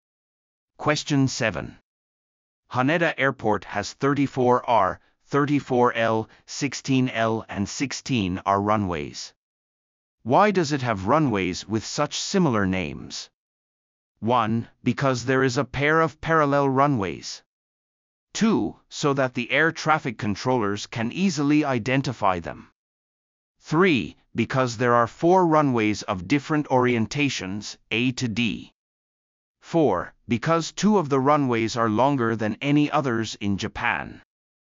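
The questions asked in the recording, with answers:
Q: Why does it have runways with such similar names?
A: 1: Because there is a pair of parallel runways.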